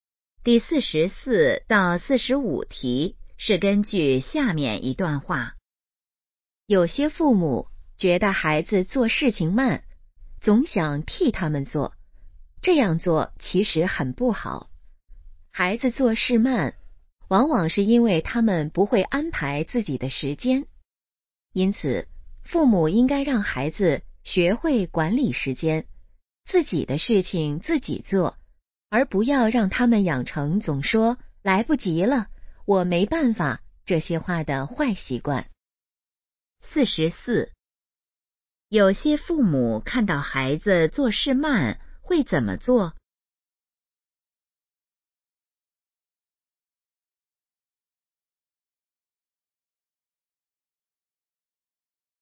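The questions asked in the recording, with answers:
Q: 有些父母看到孩子做事慢会怎么做?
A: 替他们做

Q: 根据这段话,应让孩子养成什么好习惯?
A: 管理时间,自己的事情自己做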